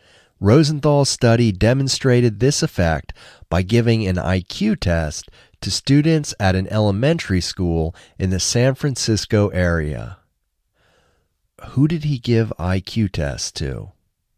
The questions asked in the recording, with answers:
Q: Who did he give IQ tests to?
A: He gave IQ tests to students at an elementary school in the San Francisco area.